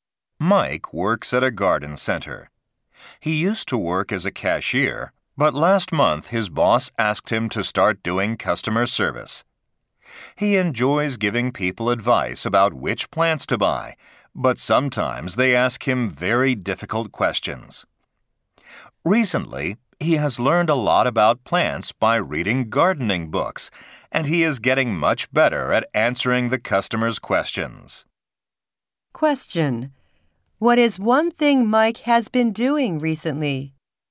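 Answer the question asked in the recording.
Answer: Reading gardening books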